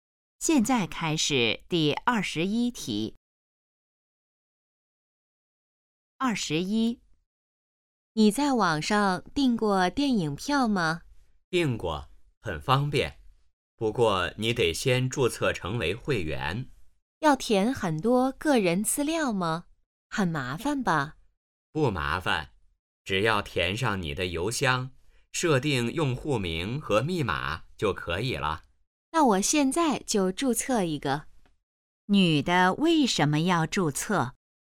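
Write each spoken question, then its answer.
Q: 女的为什么要注册?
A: 要在网上订电影票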